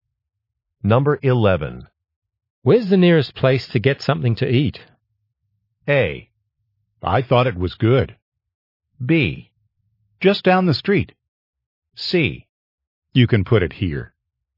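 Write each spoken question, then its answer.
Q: Where's the nearest place to get something to eat?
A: B: Just down the street.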